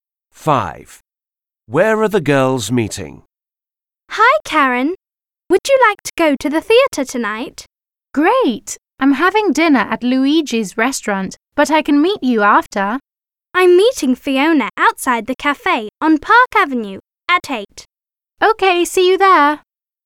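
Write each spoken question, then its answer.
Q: Where are the girls meeting?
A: Outside the cafe on Park Avenue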